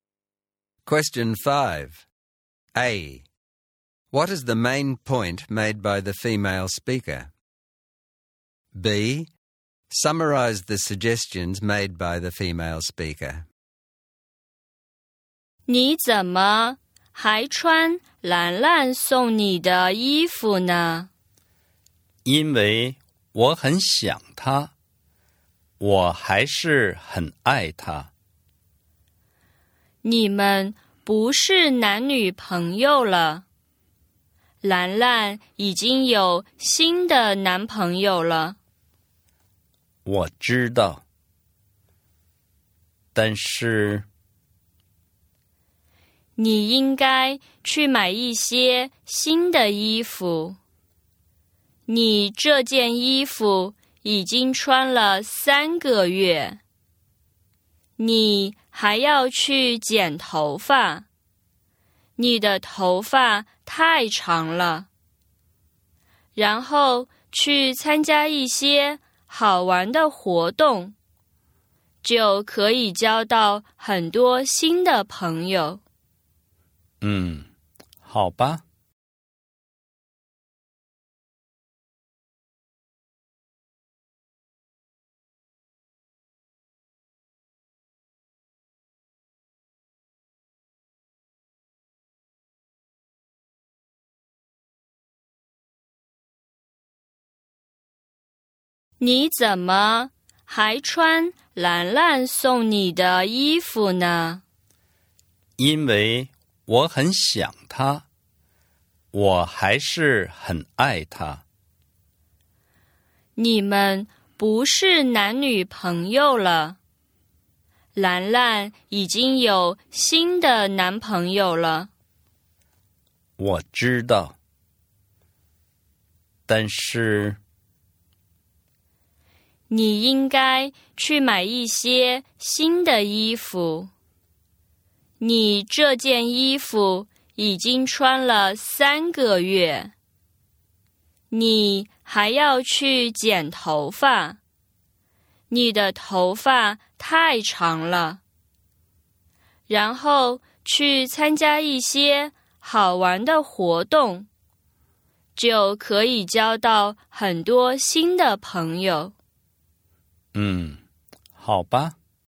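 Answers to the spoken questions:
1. He should move on from Lanlan, who already has a new boyfriend.
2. Buy some new clothes, get a haircut, and join fun activities to make new friends.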